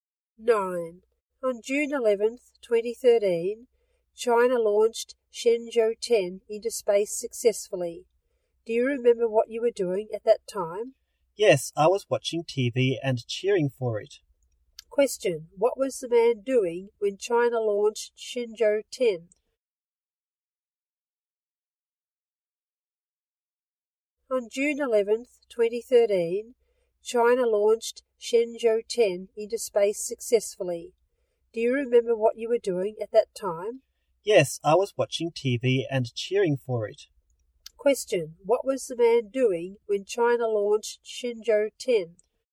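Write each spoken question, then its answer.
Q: Question, what was the man doing when China launched Shenzhou 10?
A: Watching TV and cheering for it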